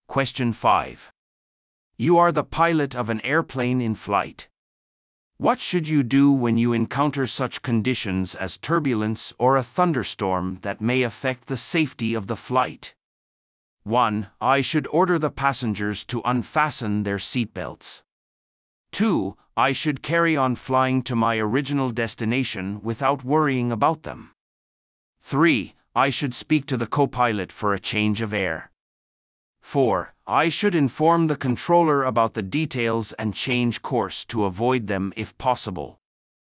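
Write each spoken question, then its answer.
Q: What should you do when you encounter such conditions as turbulence or a thunderstorm that may affect the safety of the flight?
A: 4: I should inform the controller about the details and change course to avoid them if possible.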